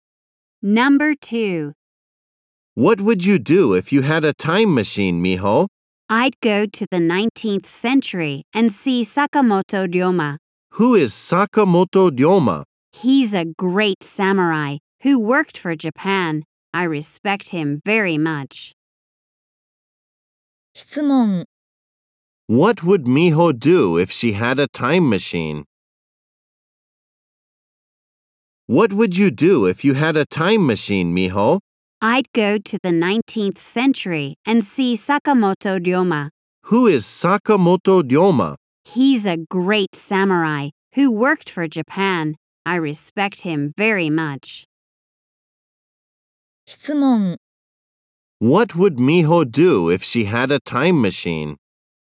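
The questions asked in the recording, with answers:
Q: What would Miho do if she had a time machine?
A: She would go to the 19th century and see Sakamoto Ryoma.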